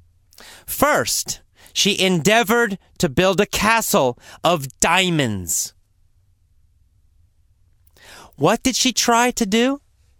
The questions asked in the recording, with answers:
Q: What did she try to do?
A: She tried to build a castle out of diamonds.